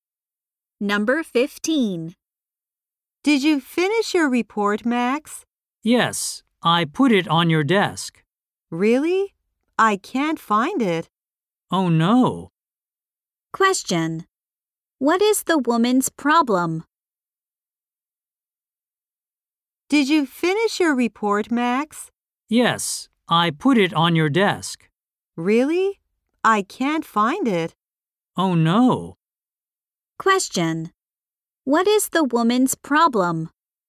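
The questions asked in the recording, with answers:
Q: What is the woman's problem?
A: She can't find Max's report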